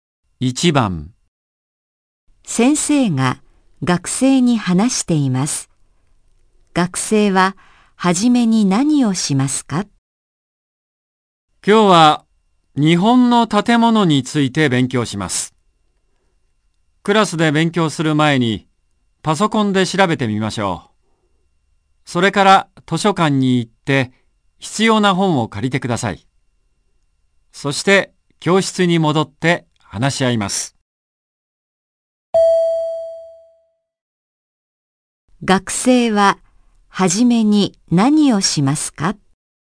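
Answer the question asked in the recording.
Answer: パソコンで調べる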